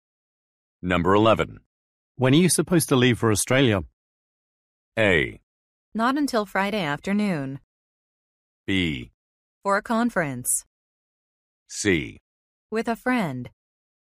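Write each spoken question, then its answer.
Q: When are you supposed to leave for Australia?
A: A: Not until Friday afternoon.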